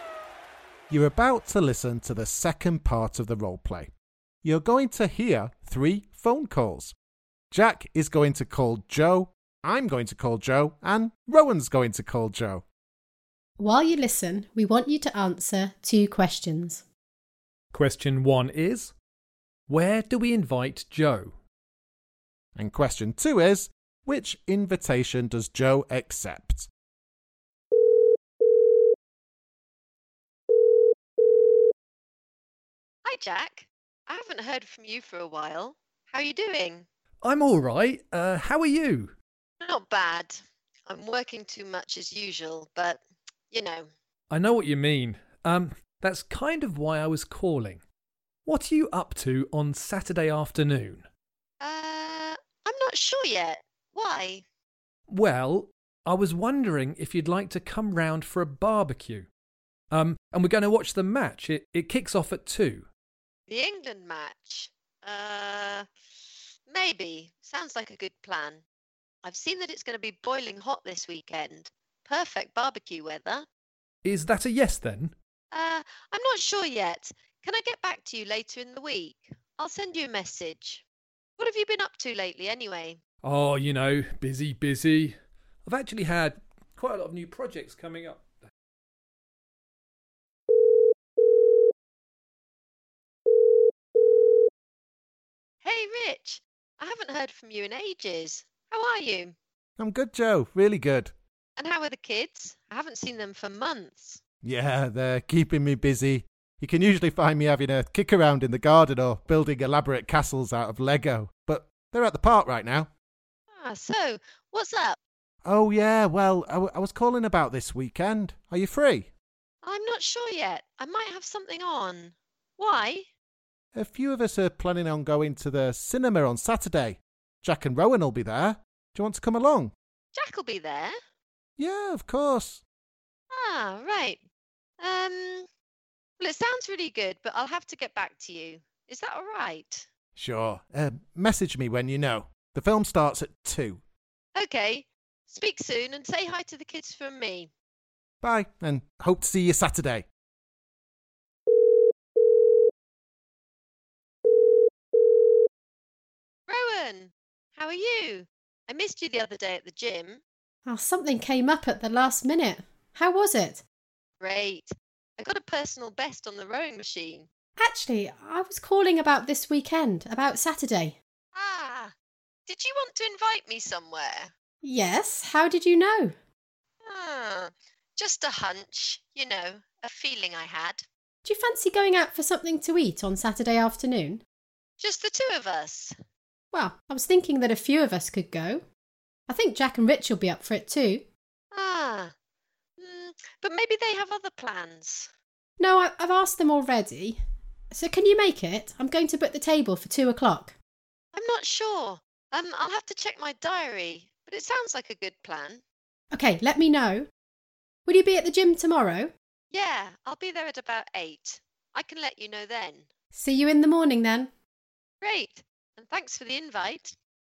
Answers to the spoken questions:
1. Well, first, I invited Jo to my house for a barbecue to watch the match.
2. She didn't accept any of them.